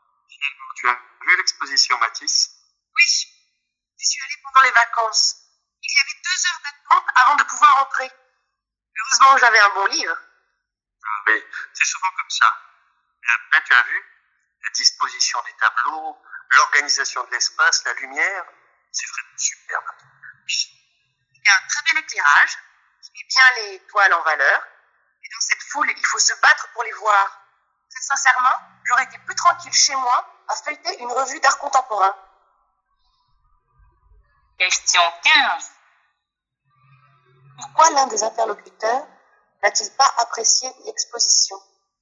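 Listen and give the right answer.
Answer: Parce qu'il y avait trop de monde (la foule, 2 heures d'attente).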